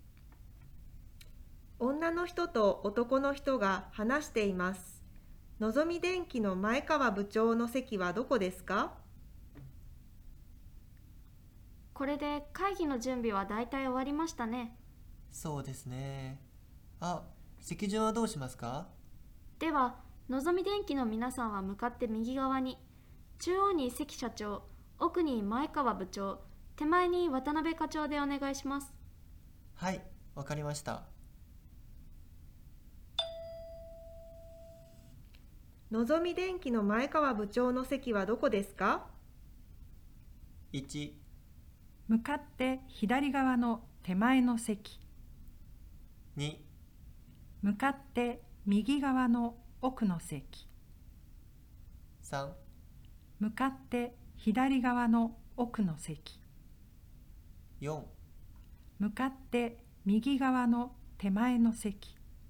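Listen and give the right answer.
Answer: 2: 向かって右側の奥の席。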